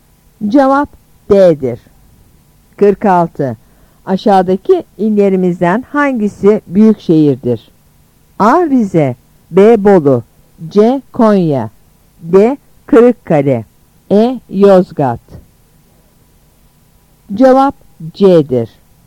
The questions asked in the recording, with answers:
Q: Aşağıdaki illerimizden hangisi büyük şehirdir?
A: Cevap C'dir.